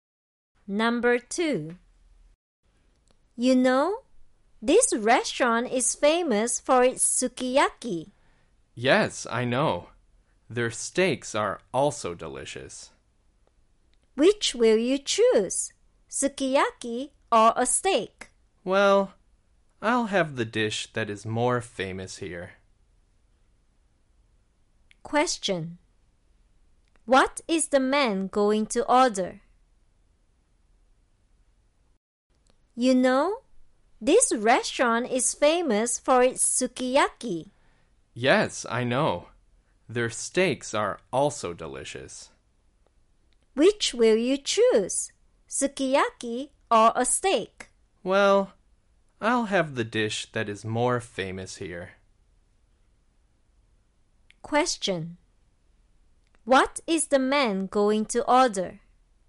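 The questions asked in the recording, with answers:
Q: What is the man going to order?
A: Sukiyaki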